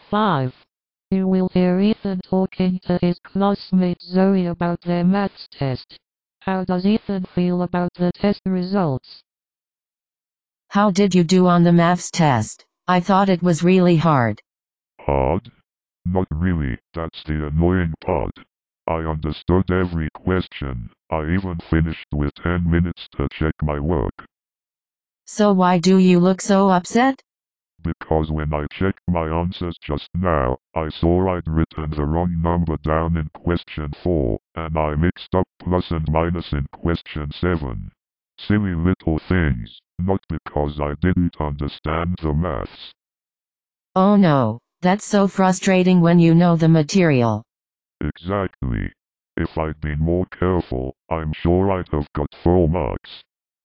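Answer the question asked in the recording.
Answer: Frustrated with himself for making careless mistakes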